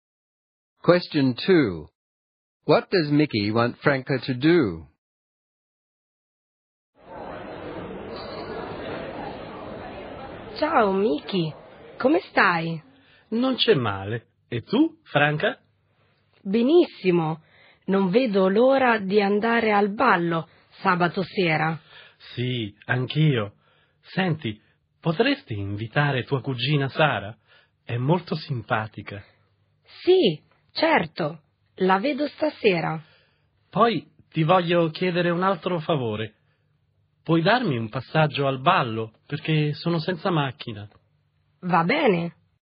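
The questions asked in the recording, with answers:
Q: What does Mickey want Franca to do?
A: Invite her cousin Sara to the dance and give him a lift to the dance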